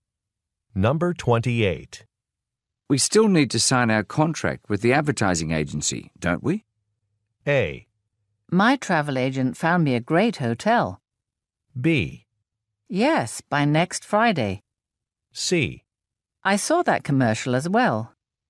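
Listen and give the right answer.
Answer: B: Yes, by next Friday.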